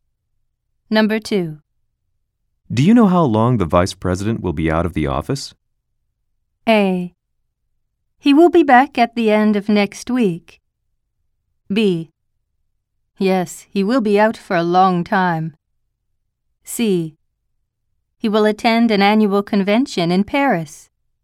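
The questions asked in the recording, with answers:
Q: Do you know how long the vice president will be out of the office?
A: A: He will be back at the end of next week.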